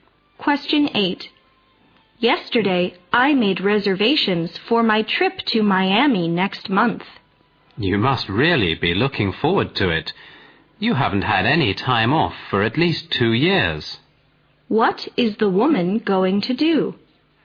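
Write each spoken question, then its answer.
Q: What is the woman going to do?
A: Take a vacation trip to Miami next month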